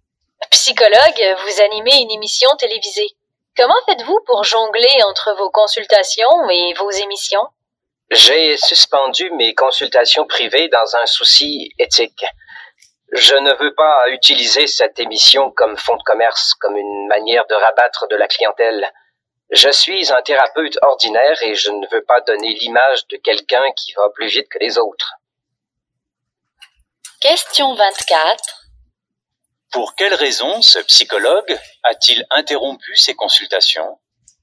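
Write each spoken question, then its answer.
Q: Pour quelle raison ce psychologue a-t-il interrompu ses consultations?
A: Pour des raisons éthiques : il ne veut pas utiliser l'émission pour attirer des clients.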